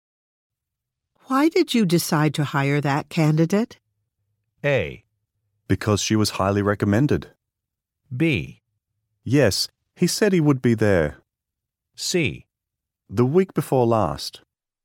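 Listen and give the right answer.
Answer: A: Because she was highly recommended.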